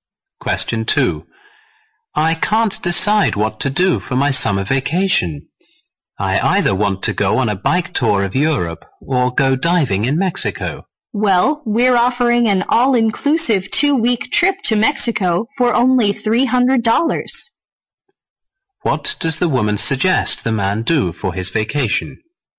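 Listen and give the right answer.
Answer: Take the cheap 2-week trip to Mexico.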